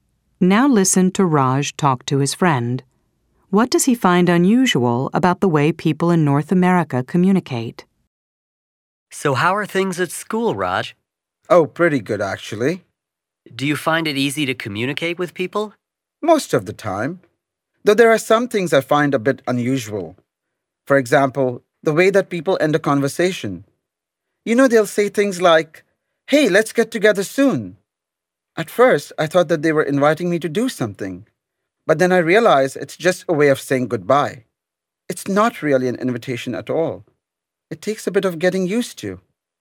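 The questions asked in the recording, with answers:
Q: What does he find unusual about the way people in North America communicate?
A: The way people end a conversation: saying "let's get together soon" is just a way of saying goodbye, not a real invitation.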